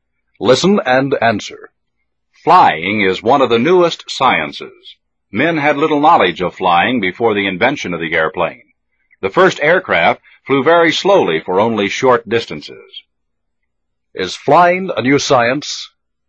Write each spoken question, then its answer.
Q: Is flying a new science?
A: Yes, it is. Flying is one of the newest sciences.